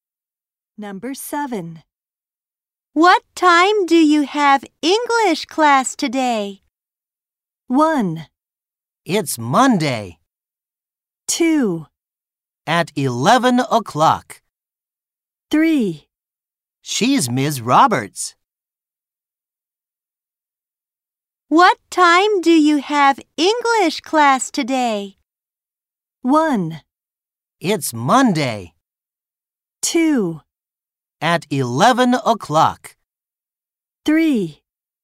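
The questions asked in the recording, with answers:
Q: What time do you have English class today?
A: 2: At 11 o'clock.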